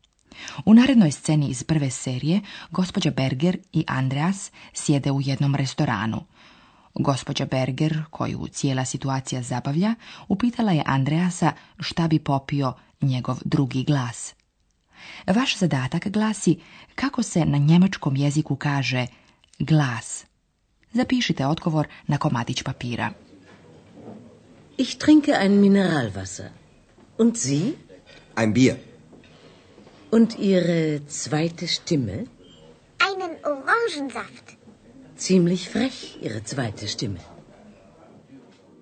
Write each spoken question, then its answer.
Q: Vaš zadatak glasi kako se na njemačkom jeziku kaže glas.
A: Odgovor glasi Stimme.